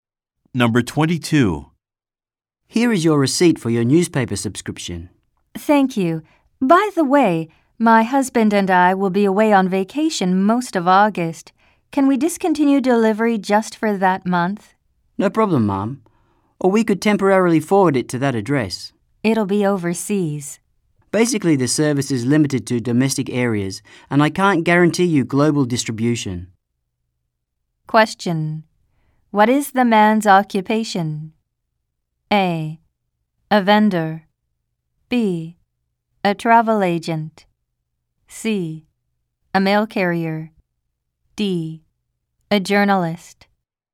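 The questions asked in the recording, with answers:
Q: What is the man's occupation?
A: A: A vendor.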